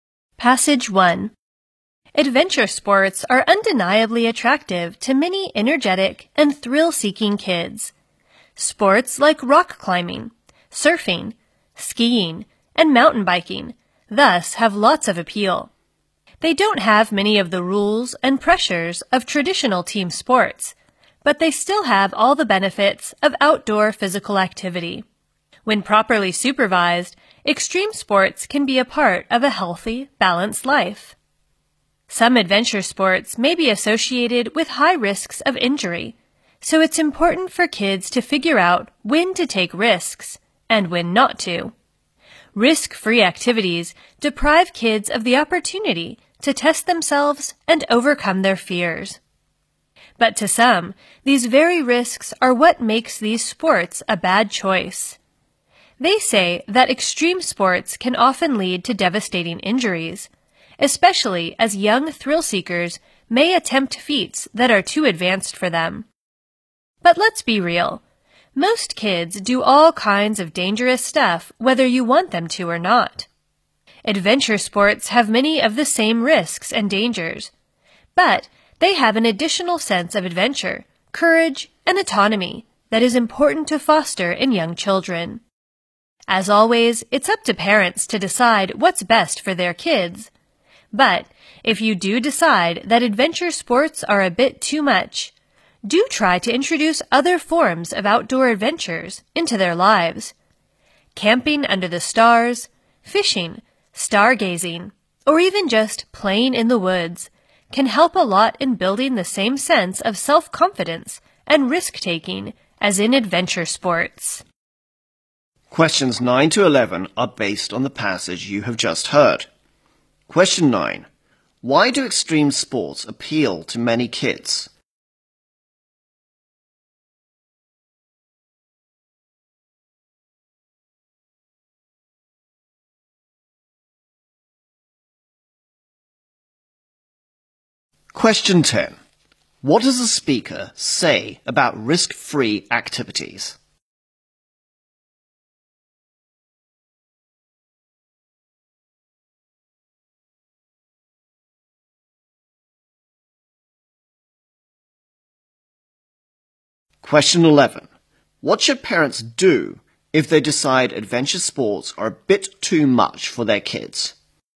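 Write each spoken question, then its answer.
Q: Why do extreme sports appeal to many kids?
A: They lack many rules and pressures of team sports but still offer outdoor physical activity.

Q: What does the speaker say about risk-free activities?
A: They deprive kids of the chance to test themselves and overcome their fears.

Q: What should parents do if they decide adventure sports are a bit too much for their kids?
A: Introduce other forms of outdoor adventures into their lives.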